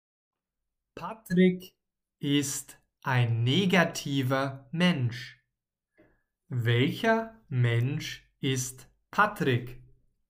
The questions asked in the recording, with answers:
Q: Welcher Mensch ist Patrick?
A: Ein negativer. Patrick ist ein negativer Mensch.